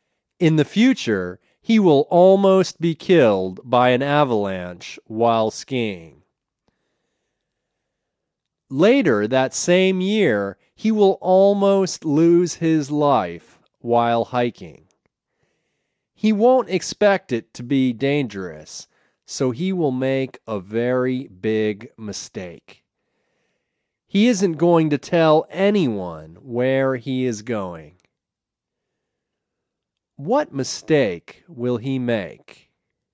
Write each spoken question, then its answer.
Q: What mistake will he make?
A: He won't tell anyone where he is going.